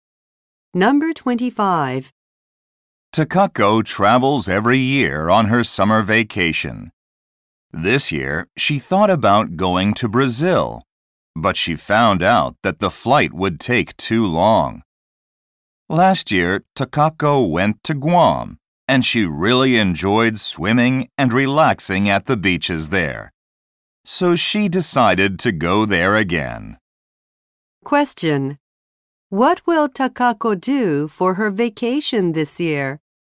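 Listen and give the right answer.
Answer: Go to Guam again.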